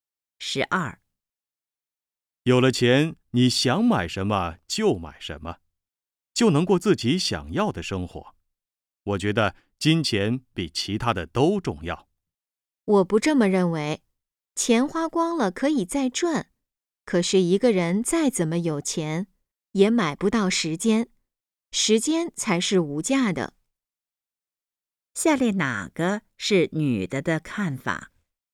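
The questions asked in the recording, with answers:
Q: 下列哪个是女的的看法?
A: 时间是无价的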